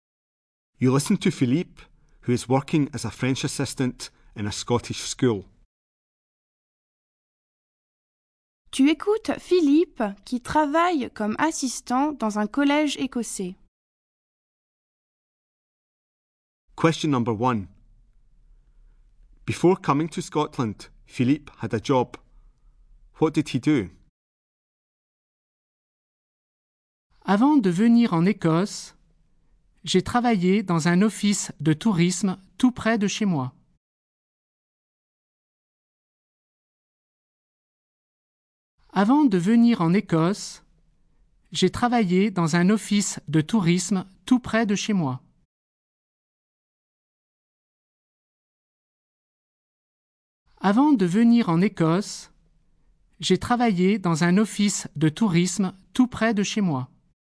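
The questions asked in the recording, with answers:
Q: Before coming to Scotland, Philippe had a job. What did he do?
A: He worked in a tourist office near his home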